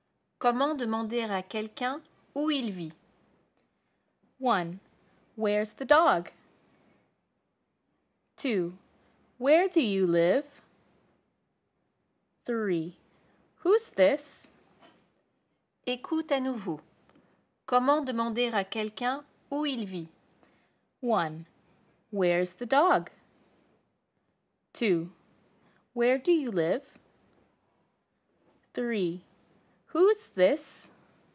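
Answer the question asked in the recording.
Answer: 2: Where do you live?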